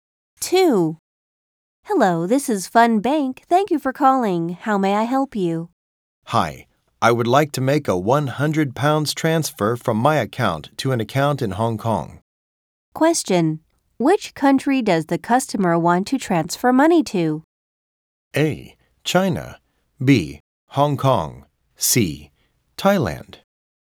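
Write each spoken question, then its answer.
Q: Which country does the customer want to transfer money to?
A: B: Hong Kong.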